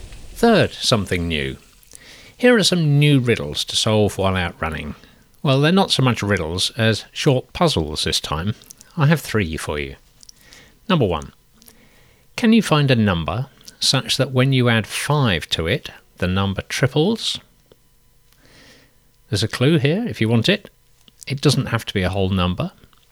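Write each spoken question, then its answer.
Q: Can you find a number such that when you add 5 to it, the number triples?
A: 2.5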